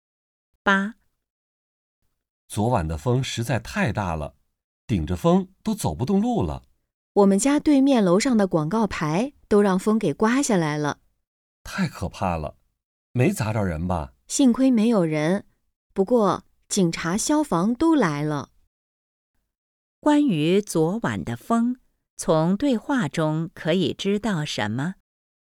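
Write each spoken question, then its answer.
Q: 关于昨晚的风,从对话中可以知道什么?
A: 风很大,把广告牌刮下来了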